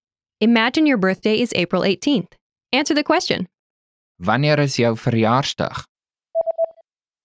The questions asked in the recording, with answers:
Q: Answer the question. Wanneer is jou verjaarsdag?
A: Dit is April die 18de.